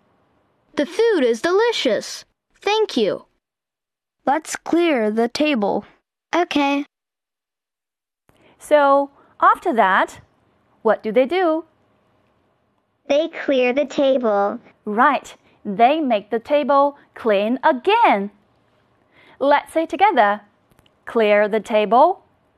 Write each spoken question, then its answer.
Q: So, after that, what do they do?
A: They clear the table.